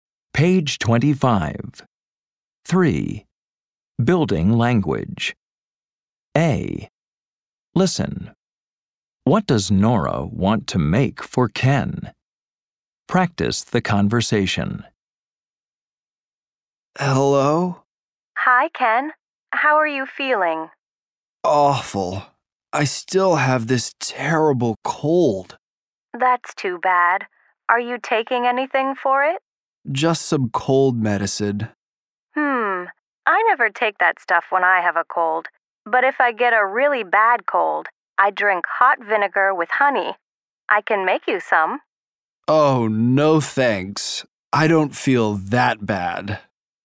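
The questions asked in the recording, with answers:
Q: What does Nora want to make for Ken?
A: Hot vinegar with honey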